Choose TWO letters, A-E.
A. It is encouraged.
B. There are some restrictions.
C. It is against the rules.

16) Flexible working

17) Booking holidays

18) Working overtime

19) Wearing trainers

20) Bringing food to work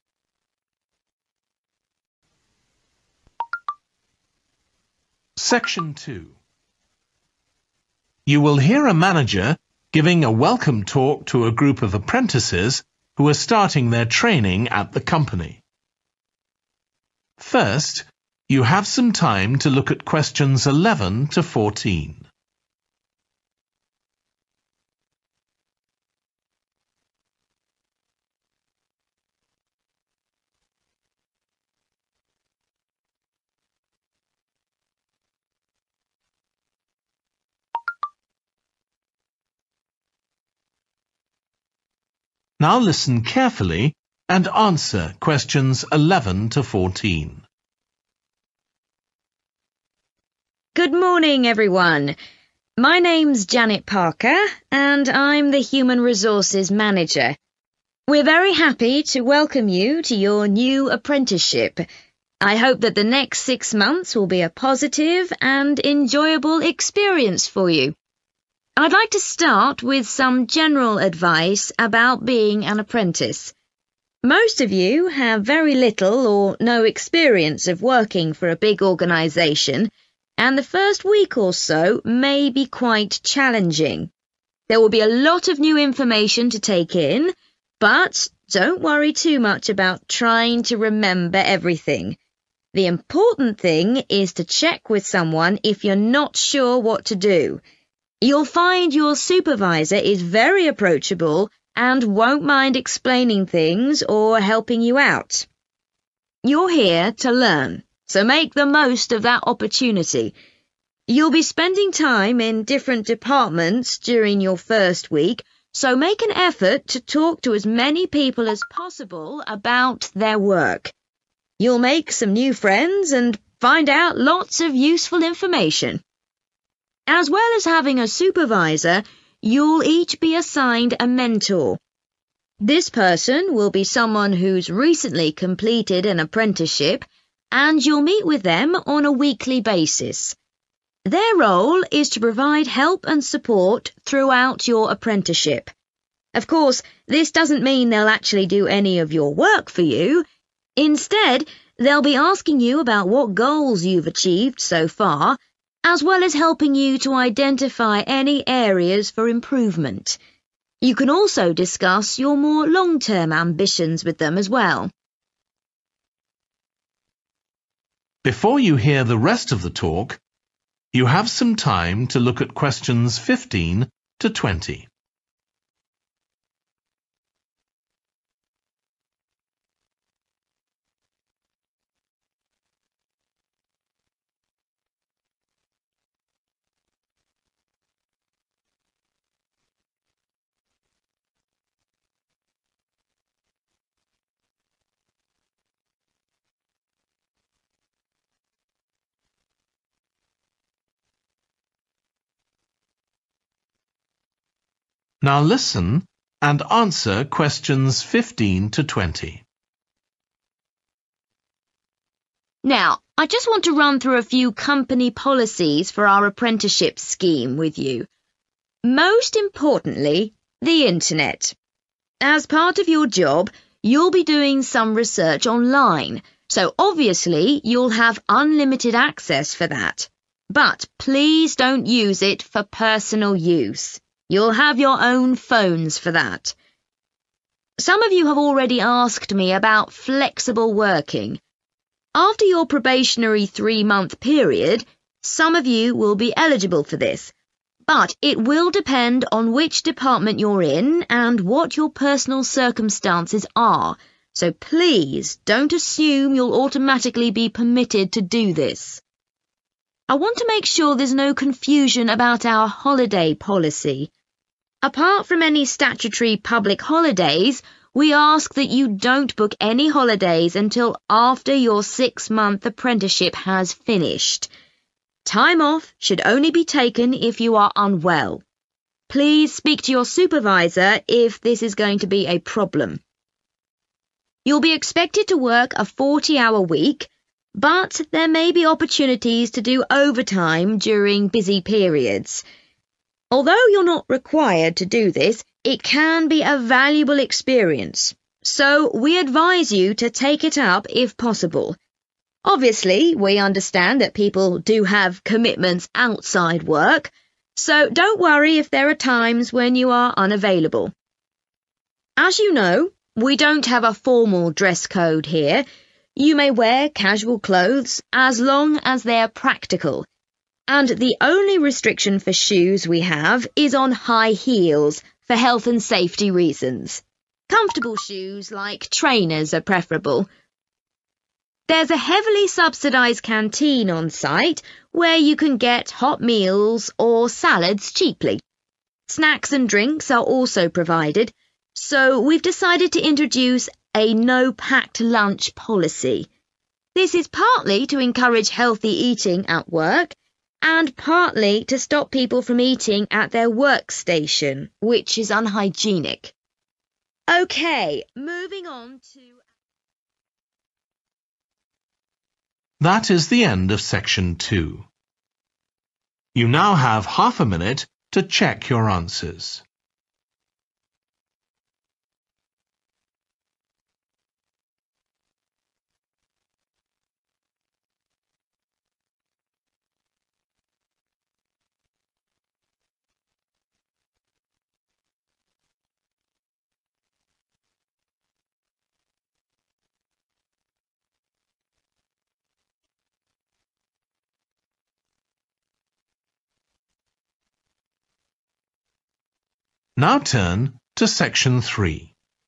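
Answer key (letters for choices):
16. B
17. C
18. A
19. A
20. C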